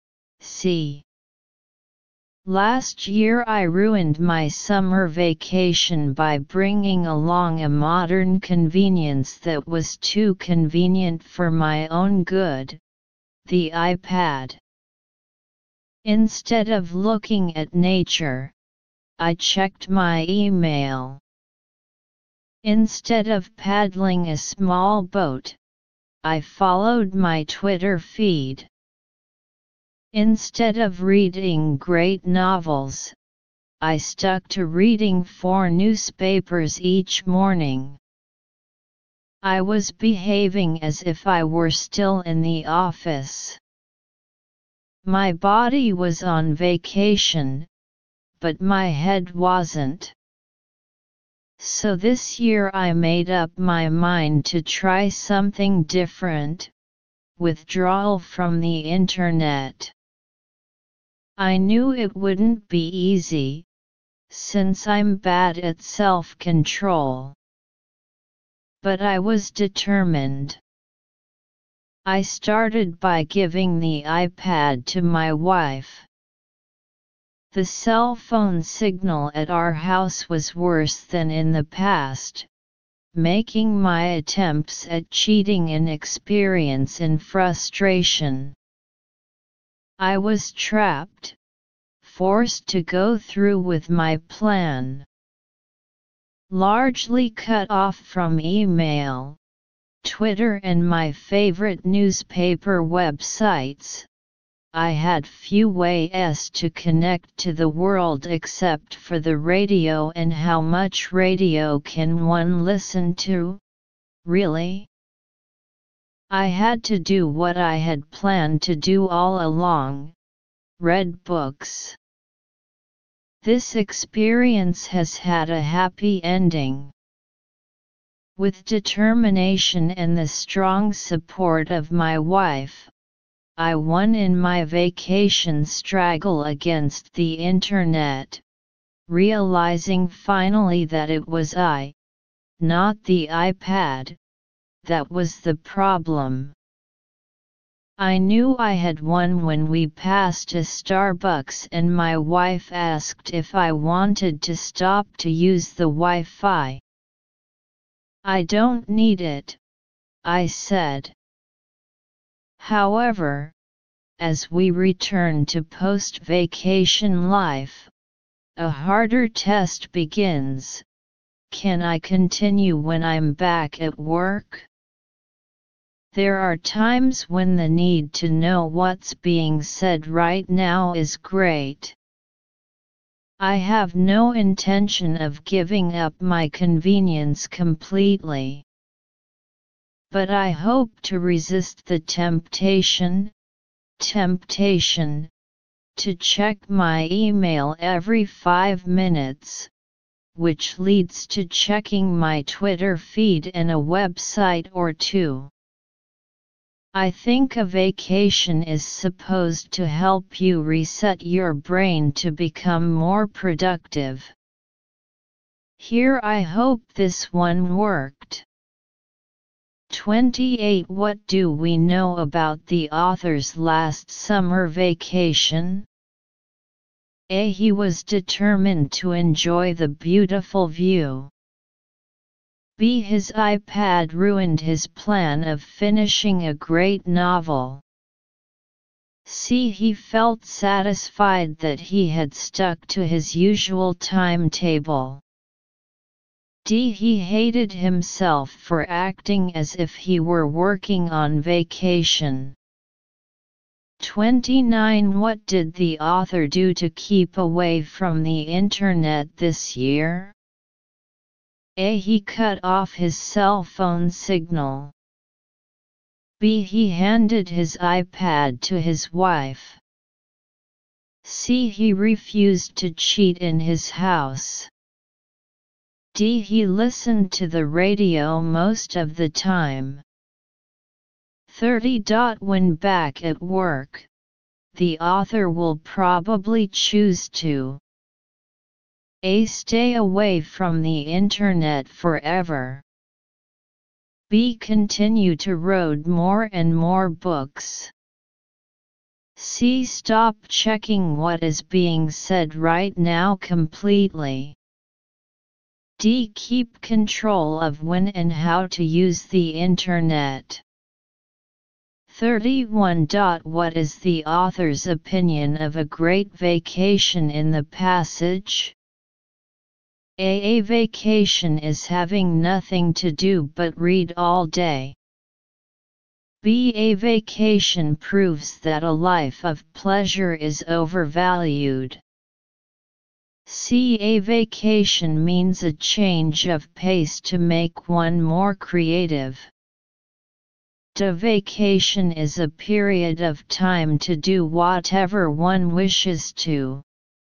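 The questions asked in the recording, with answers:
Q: What do we know about the author's last summer vacation?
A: D: He hated himself for acting as if he were working on vacation.

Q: What did the author do to keep away from the internet this year?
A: B: He handed his iPad to his wife.

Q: When back at work, the author will probably choose to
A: D: Keep control of when and how to use the internet.

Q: What is the author's opinion of a great vacation in the passage?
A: C: A vacation means a change of pace to make one more creative.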